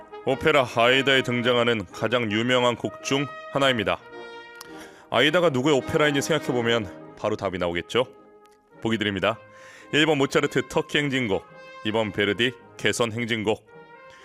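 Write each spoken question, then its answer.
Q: 오페라 아이다에 등장하는 가장 유명한 곡 중 하나입니다.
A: 2: 베르디 개선 행진곡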